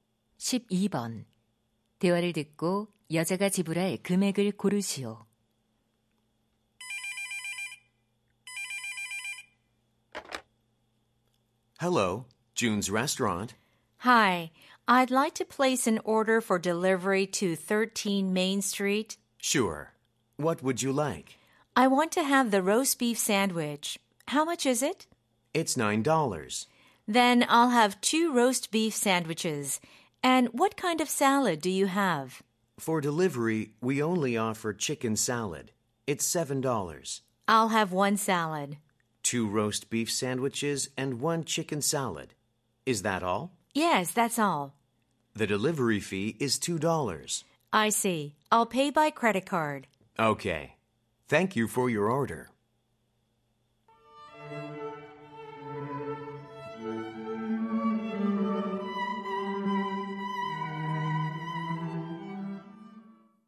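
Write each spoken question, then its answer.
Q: 대화를 듣고 여자가 지불할 금액을 고르시오.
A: 27달러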